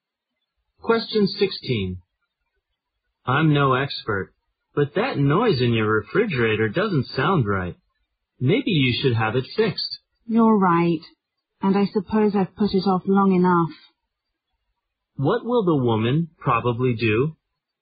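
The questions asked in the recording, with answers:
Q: What will the woman probably do?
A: Have the refrigerator repaired.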